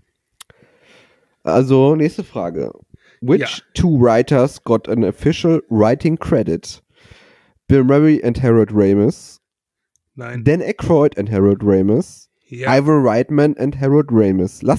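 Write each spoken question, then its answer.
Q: Which two writers got an official writing credit?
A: Dan Aykroyd and Harold Ramis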